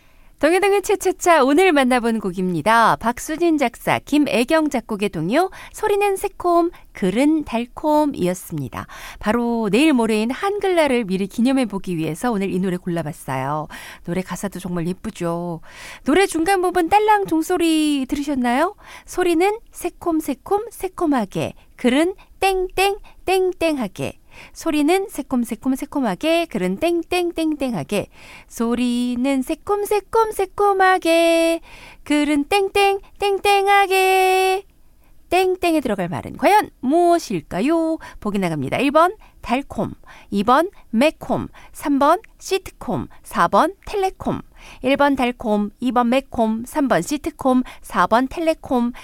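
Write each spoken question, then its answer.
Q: 땡땡에 들어갈 말은 과연 무엇일까요?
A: 1: 달콤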